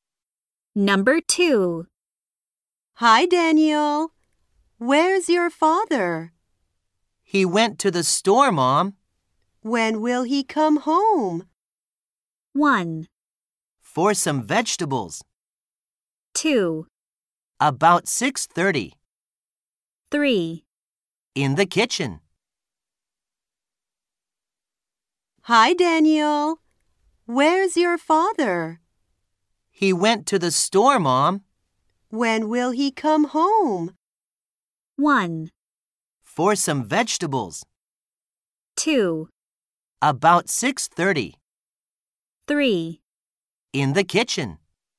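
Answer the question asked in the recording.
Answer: 2: About 6:30.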